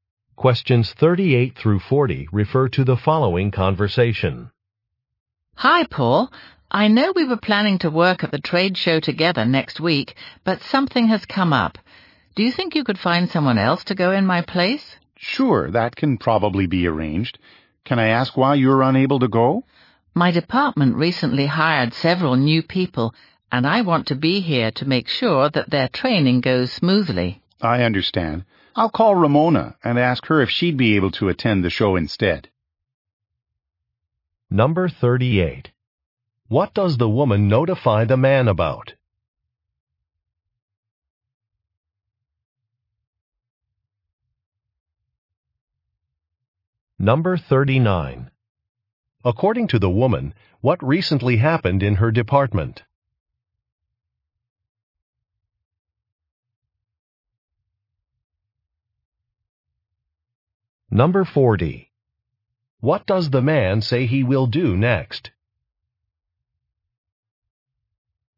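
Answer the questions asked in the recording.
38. She cannot attend the trade show
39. Several new people were hired
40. Call Ramona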